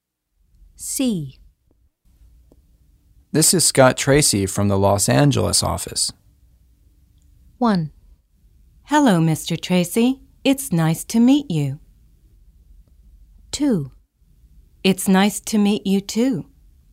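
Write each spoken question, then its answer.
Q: This is Scott Tracy from the Los Angeles office.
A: 1: Hello, Mr. Tracy. It's nice to meet you.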